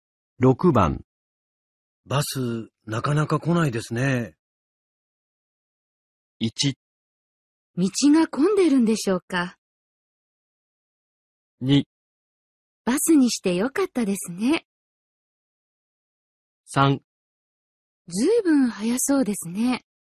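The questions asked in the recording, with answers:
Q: バス、なかなか来ないですね。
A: 1: 道が混んでるんでしょうか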